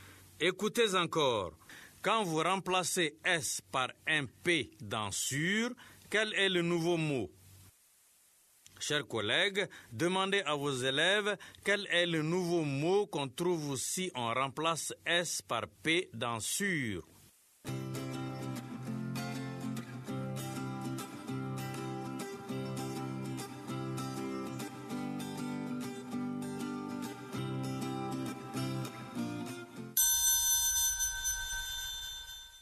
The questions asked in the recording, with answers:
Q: Quand vous remplacez S par un P dans sûr, quel est le nouveau mot?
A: Monsieur, c'est pur.